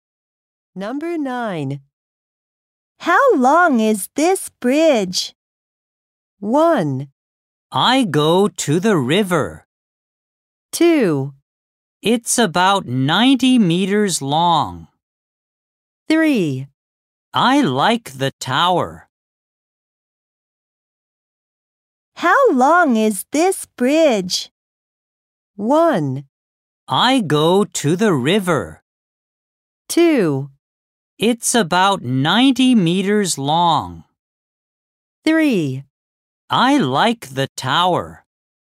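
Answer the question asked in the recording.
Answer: 2: It's about 90 meters long.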